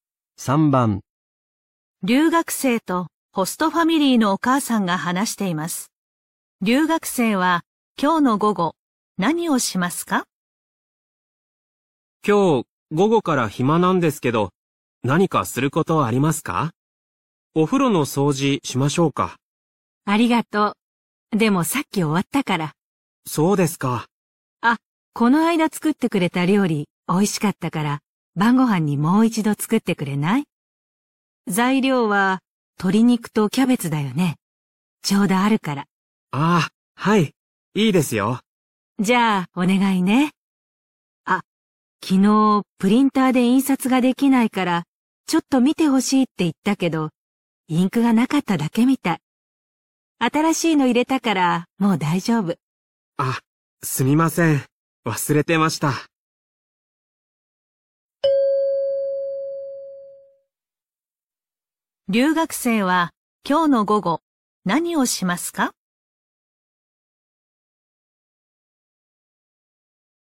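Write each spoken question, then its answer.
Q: 留学生は今日の午後何をしますか?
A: 晩ご飯の料理を作る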